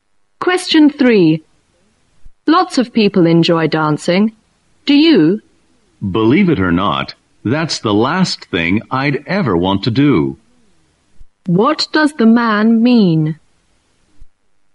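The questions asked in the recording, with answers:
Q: What does the man mean?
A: He doesn't like dancing at all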